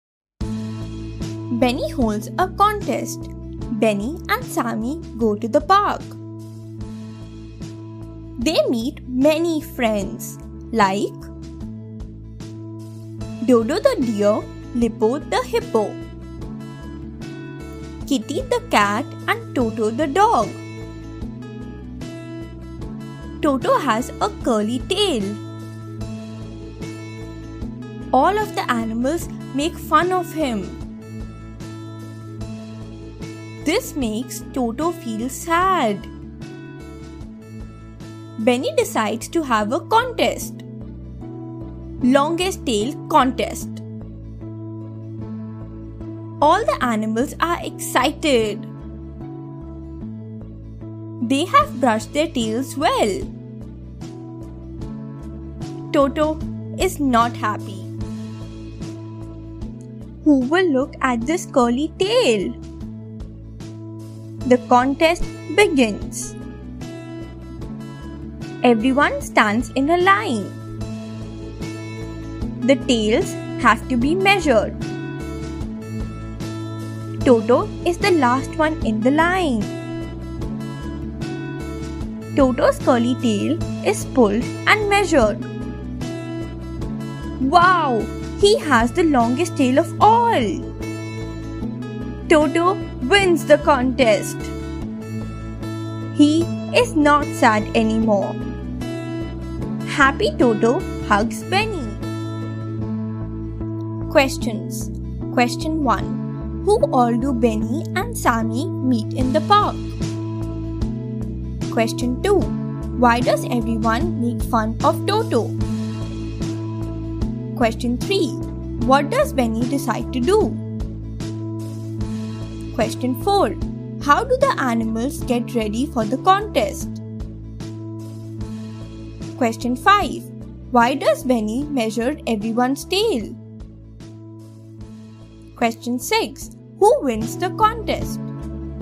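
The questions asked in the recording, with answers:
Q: Who all do Benny and Sammy meet in the park?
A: Dodo the deer, Lippo the hippo, Kitty the cat and Toto the dog

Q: Why does everyone make fun of Toto?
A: He has a curly tail

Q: What does Benny decide to do?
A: Have a longest tail contest

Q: How do the animals get ready for the contest?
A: They brush their tails well

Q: Who wins the contest?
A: Toto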